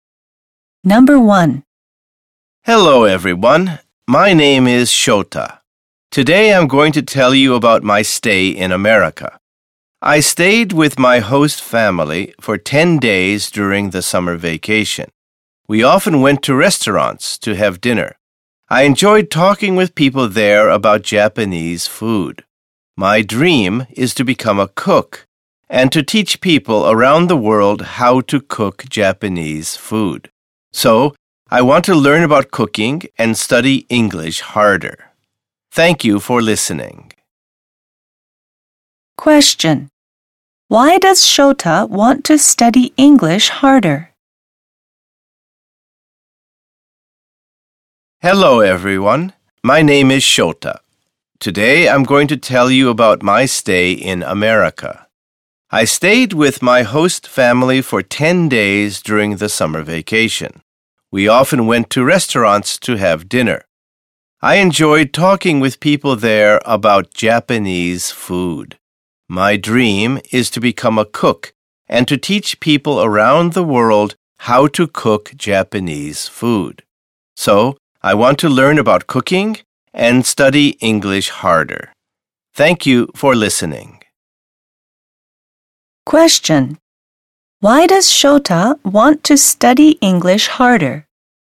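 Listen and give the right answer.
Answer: To teach people around the world how to cook Japanese food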